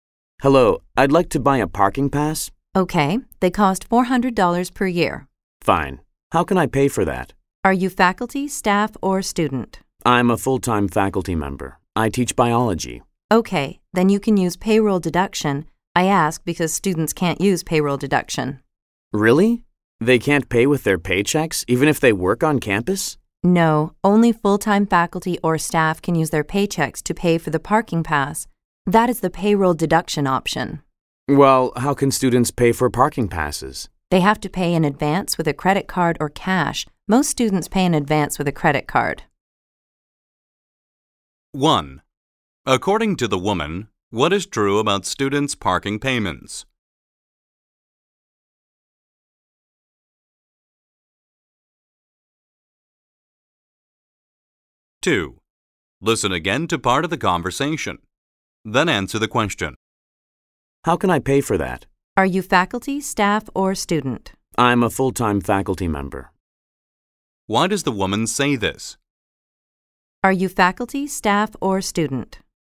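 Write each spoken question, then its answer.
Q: According to the woman, what is true about students' parking payments?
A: They can't use payroll deduction; they must pay in advance by credit card or cash

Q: Why does the woman say this?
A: To find out which payment options the man can use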